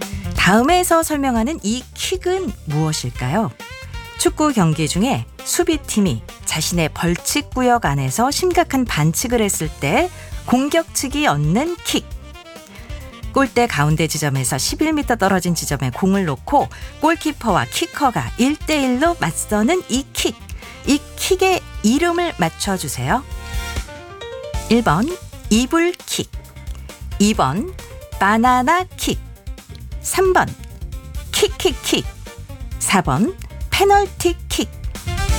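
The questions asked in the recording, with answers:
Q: 이 킥의 이름을 맞춰주세요.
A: 4: 페널티킥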